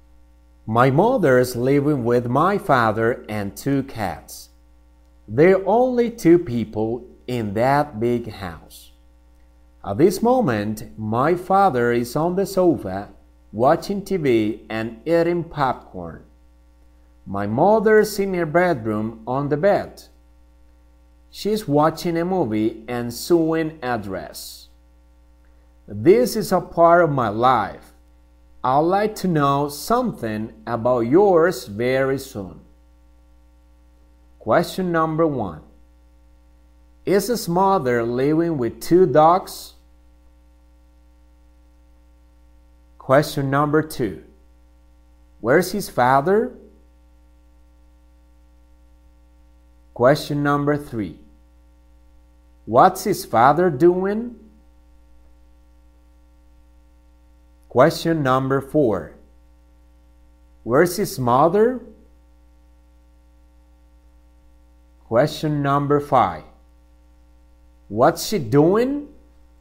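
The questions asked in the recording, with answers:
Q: Is his mother living with 2 dogs?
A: No, with 2 cats

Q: Where's his father?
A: On the sofa

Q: What's his father doing?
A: Watching TV and eating popcorn

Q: Where's his mother?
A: In her bedroom on the bed

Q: What's she doing?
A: Watching a movie and sewing a dress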